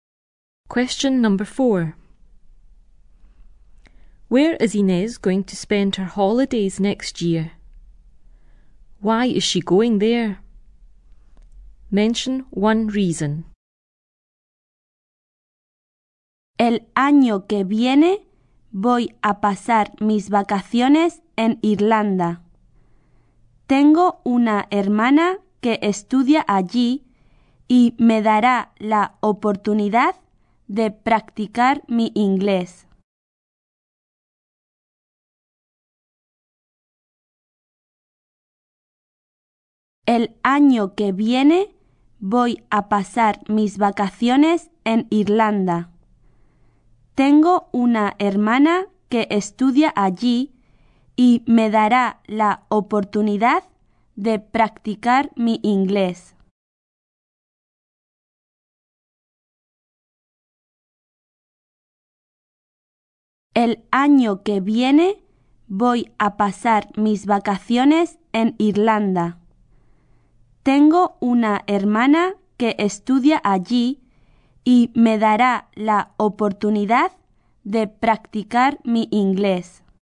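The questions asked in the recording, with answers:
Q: Where is Inez going to spend her holidays next year?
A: Ireland

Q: Why is she going there? Mention one reason.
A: Her sister studies there / to practise her English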